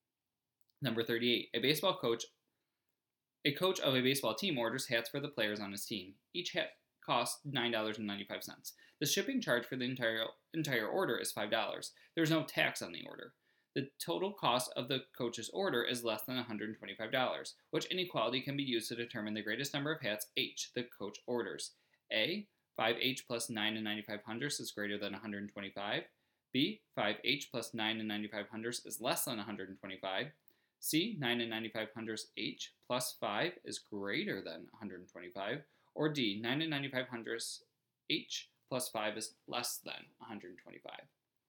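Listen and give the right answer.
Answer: D: 9 and 95 hundredths H plus 5 is less than 125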